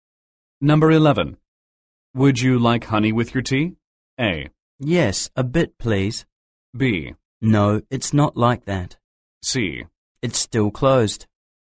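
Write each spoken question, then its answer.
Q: Would you like honey with your tea?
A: A: Yes, a bit, please.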